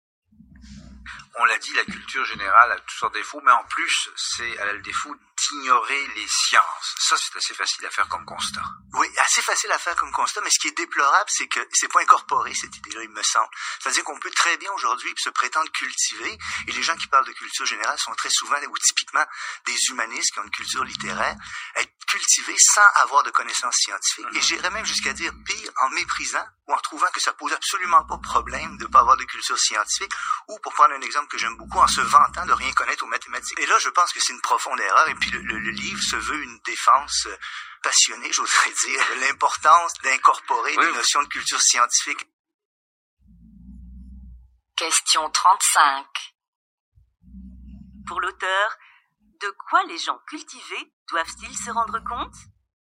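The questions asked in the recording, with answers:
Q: Pour l'auteur, de quoi les gens cultivés doivent-ils se rendre compte?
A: De l'importance de la culture scientifique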